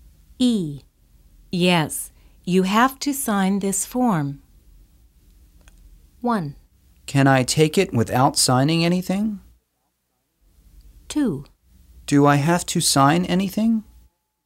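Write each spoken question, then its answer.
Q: Yes, you have to sign this form.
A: 2: Do I have to sign anything?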